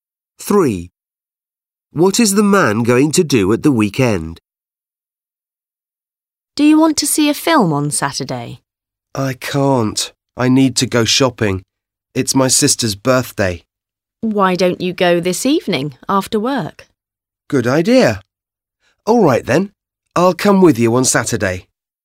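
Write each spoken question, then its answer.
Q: What is the man going to do at the weekend?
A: see a film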